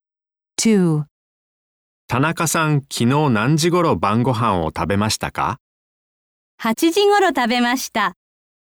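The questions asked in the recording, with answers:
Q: 田中さん、昨日何時頃晩ご飯を食べましたか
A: 8時頃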